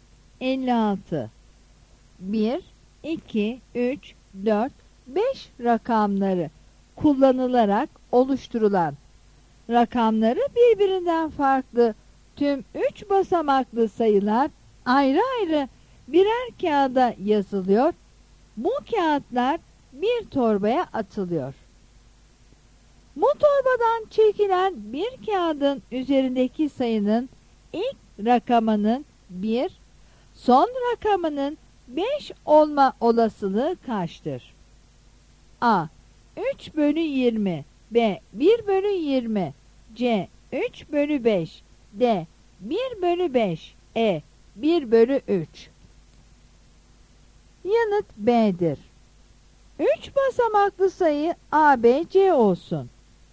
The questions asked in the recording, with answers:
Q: Bu torbadan çekilen bir kağıdın üzerindeki sayının ilk rakamının 1, son rakamının 5 olma olasılığı kaçtır?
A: Yanıt B'dir.